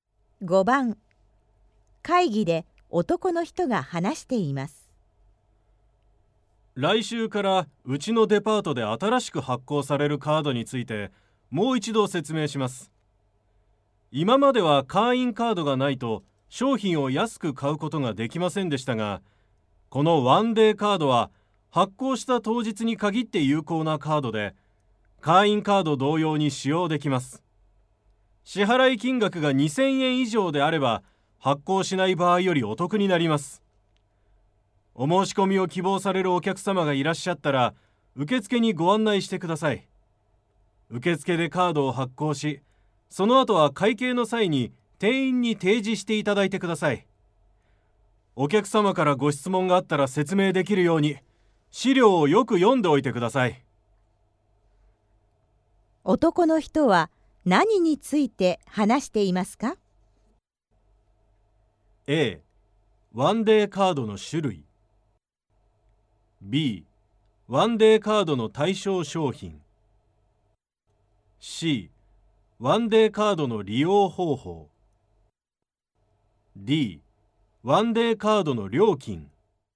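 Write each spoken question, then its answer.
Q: 男の人は何について話していますか?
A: C: ワンデーカードの利用方法。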